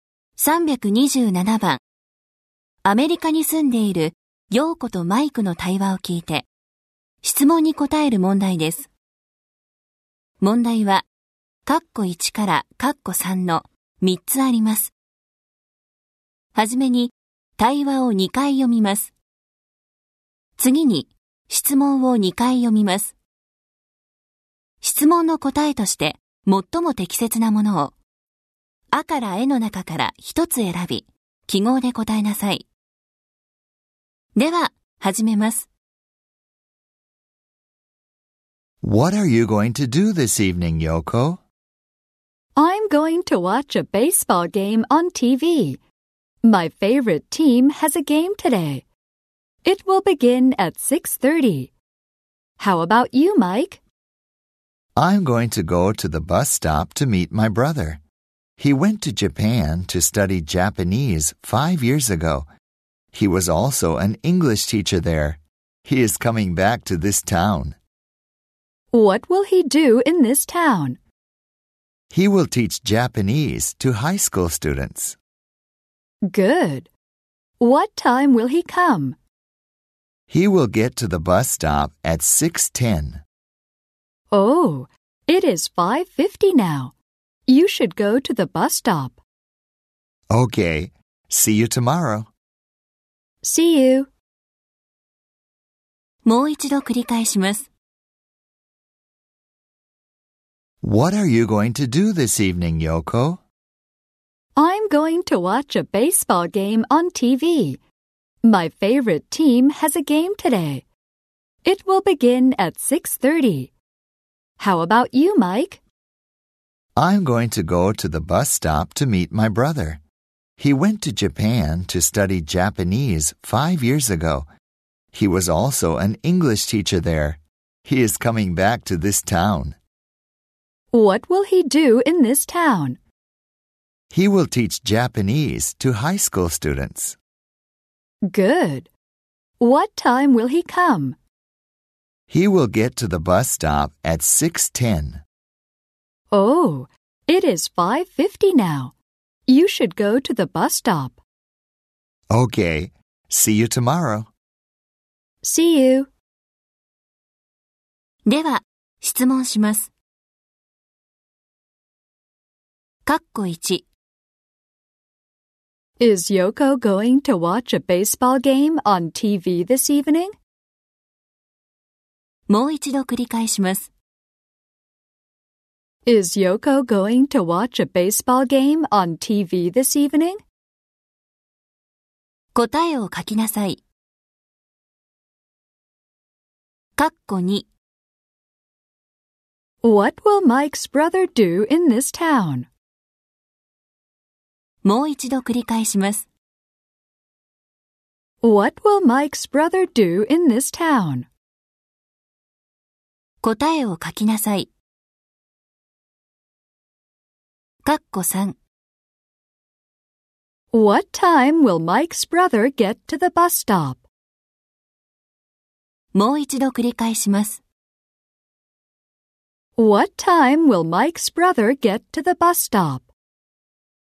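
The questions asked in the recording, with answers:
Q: Is Yoko going to watch a baseball game on TV this evening?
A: Yes, she is.

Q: What will Mike's brother do in this town?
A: He will teach Japanese to high school students.

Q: What time will Mike's brother get to the bus stop?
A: At 6:10.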